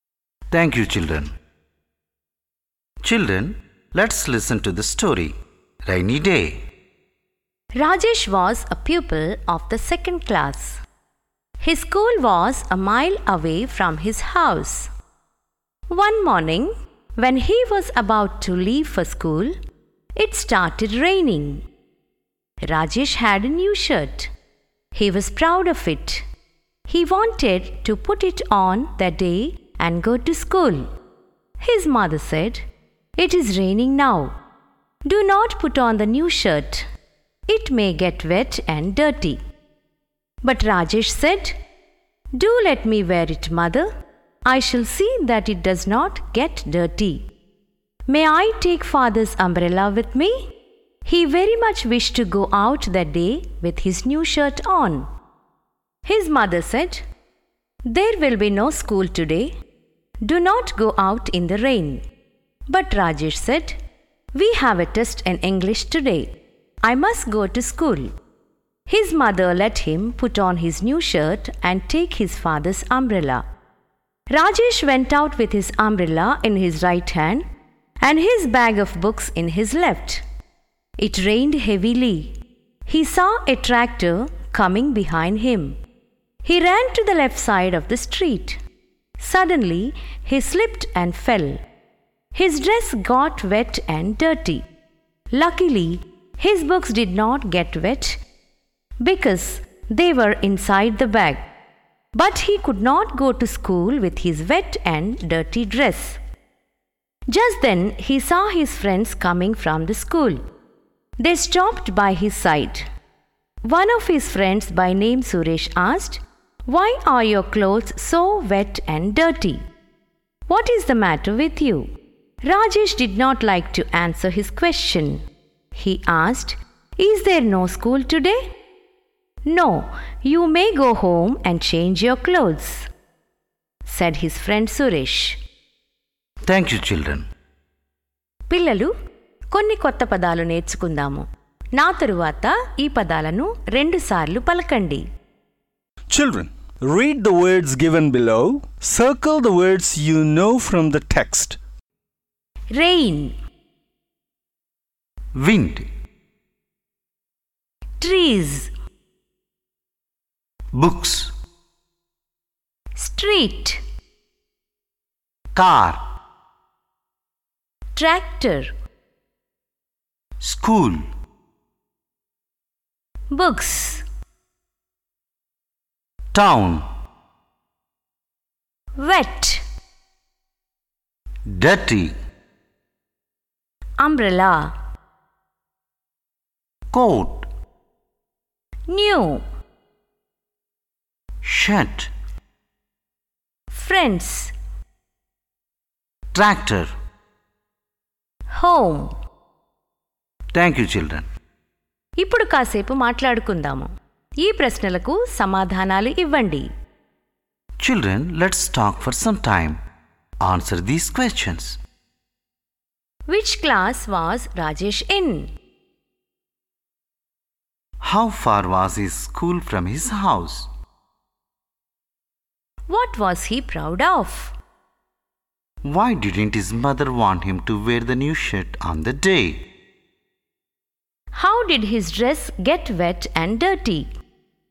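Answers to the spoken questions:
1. The second class
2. A mile away
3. His new shirt
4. It was raining and the shirt might get wet and dirty
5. He slipped and fell in the street while running from a tractor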